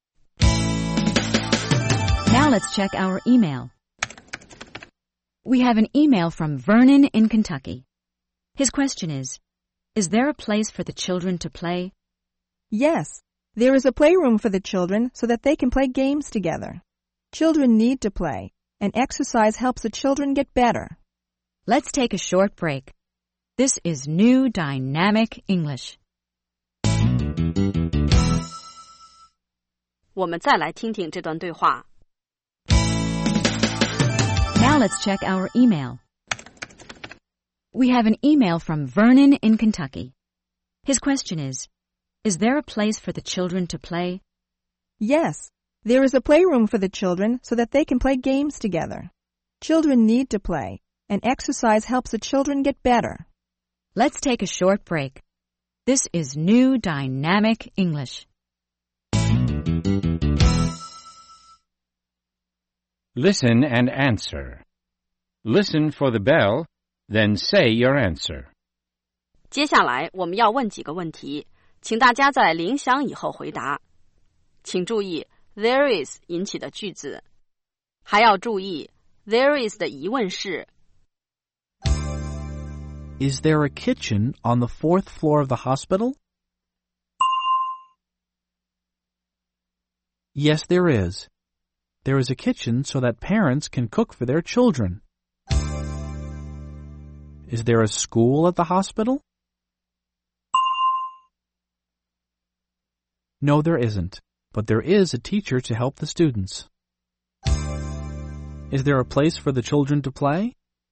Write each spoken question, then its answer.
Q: Is there a place for the children to play?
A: Yes, there is. There's a playroom.